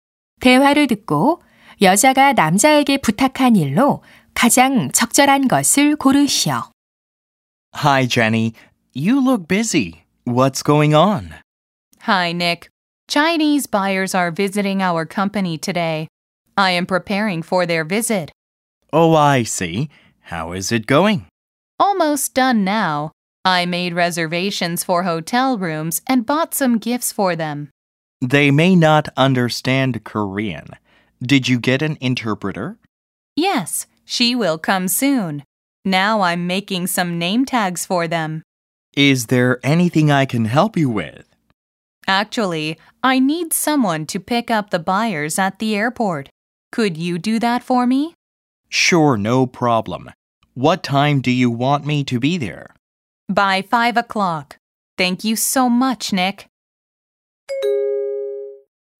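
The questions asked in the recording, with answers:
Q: 대화를 듣고 여자가 남자에게 부탁한 일로 가장 적절한 것을 고르시오.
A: 공항에 바이어 마중 나가기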